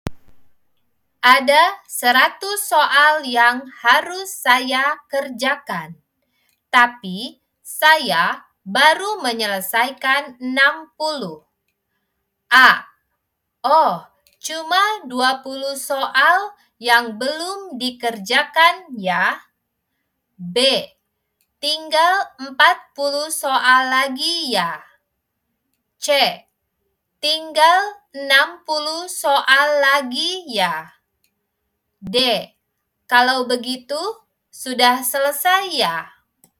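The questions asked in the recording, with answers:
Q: Ada 100 soal yang harus saya kerjakan, tapi saya baru menyelesaikan 60.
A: B: Tinggal 40 soal lagi ya.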